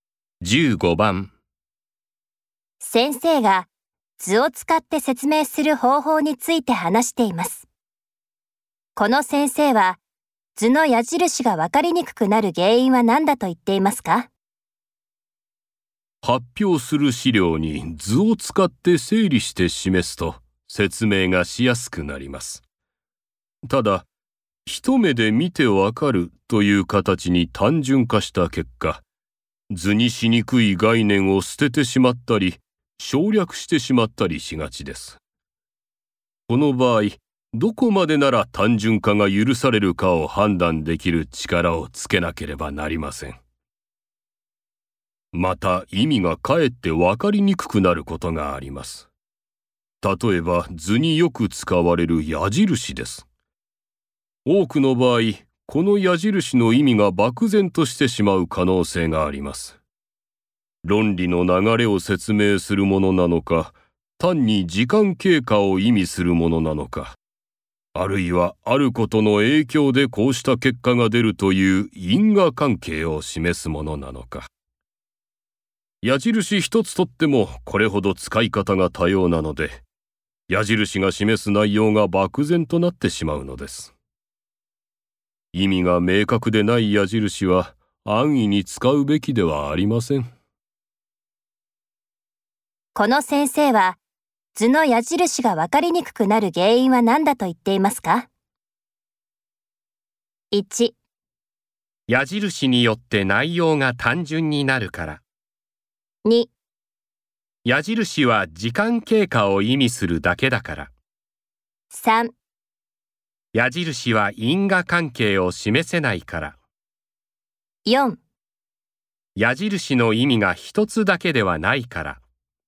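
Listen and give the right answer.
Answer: 4: 矢印の意味が一つだけではないから。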